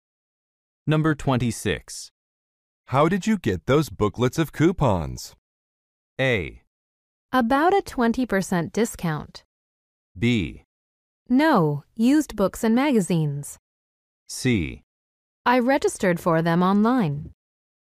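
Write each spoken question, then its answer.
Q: How did you get those booklets of coupons?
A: C: I registered for them online.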